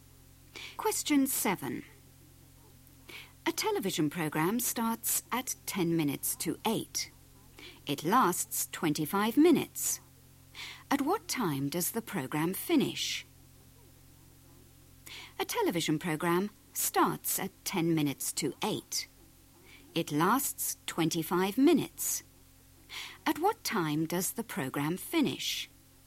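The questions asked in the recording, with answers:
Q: At what time does the program finish?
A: 8:35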